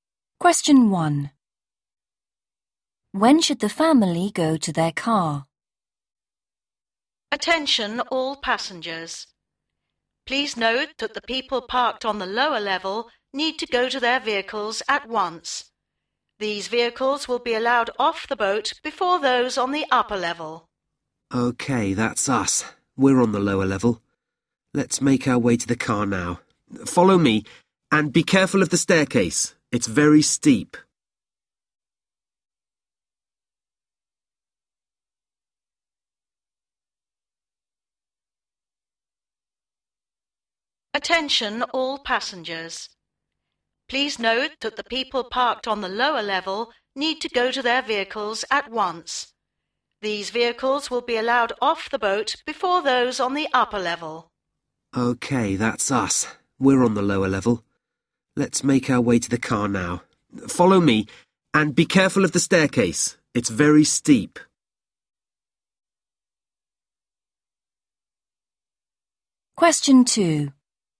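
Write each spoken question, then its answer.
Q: When should the family go to their car?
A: At once (now)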